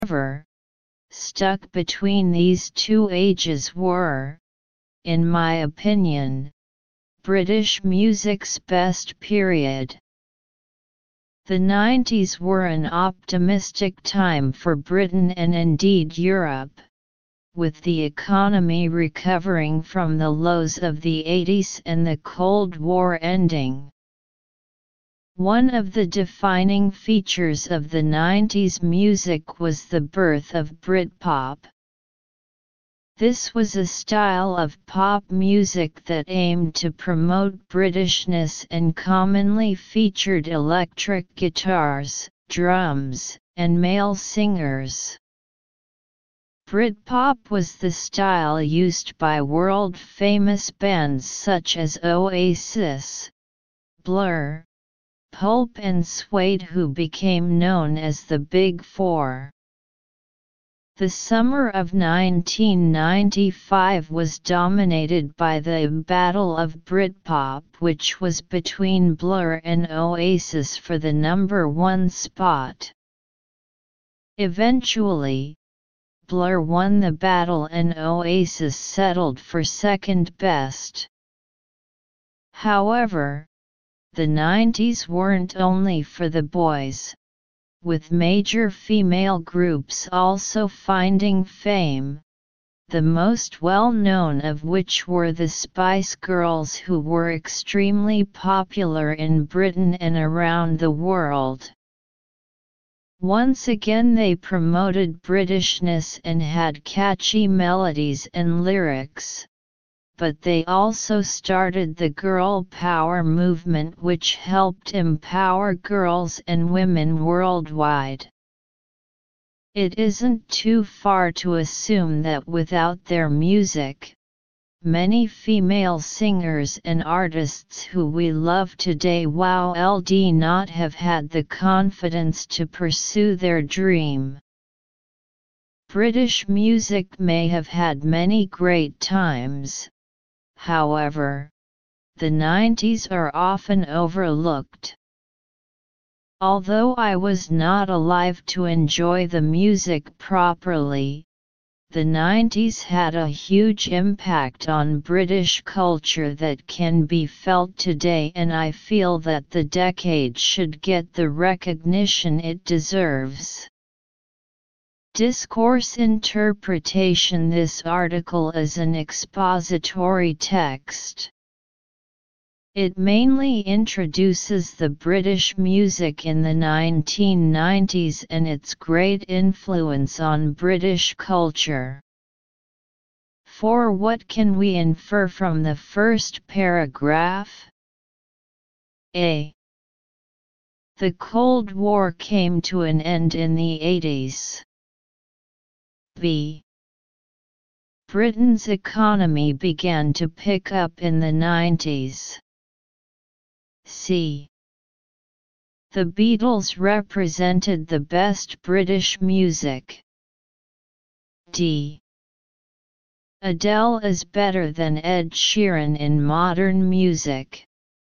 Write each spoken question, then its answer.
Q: For what can we infer from the first paragraph?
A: so choose B, pickup means improvement